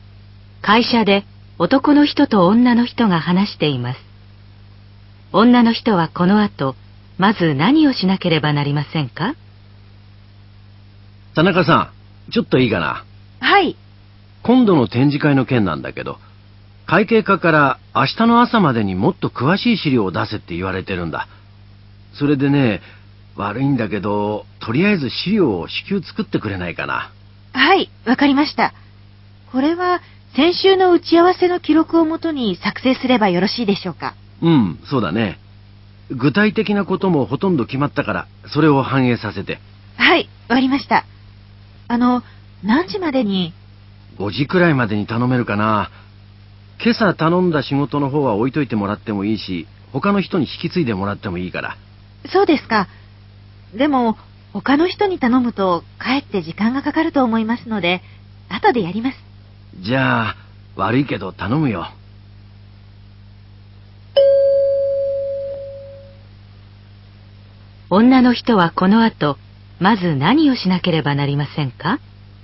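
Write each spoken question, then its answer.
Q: 女の人はこの後、まず何をしなければなりませんか?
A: 展示会の詳しい資料を作る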